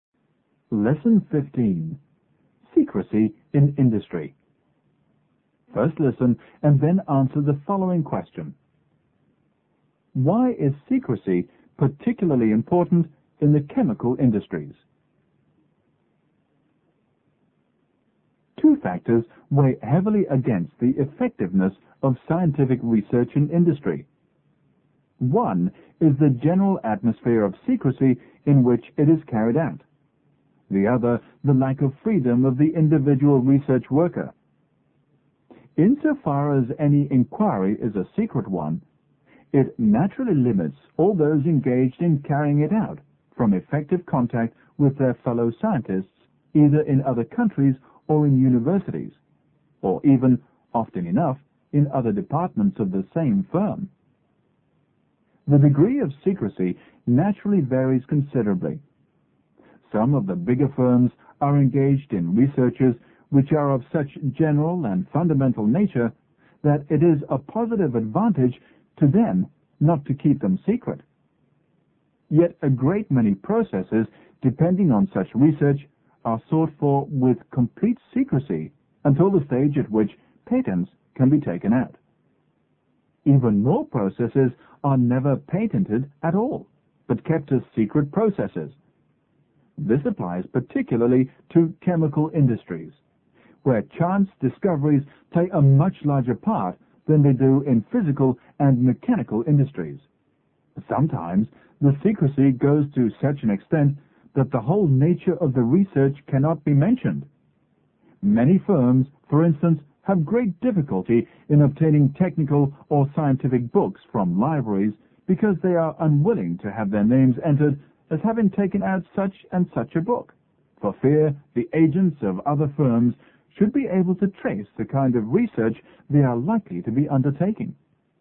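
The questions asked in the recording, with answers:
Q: Why is secrecy particularly important in the chemical industries?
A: Because chance discoveries play a much larger part in them than in physical and mechanical industries, so many processes are never patented but kept secret.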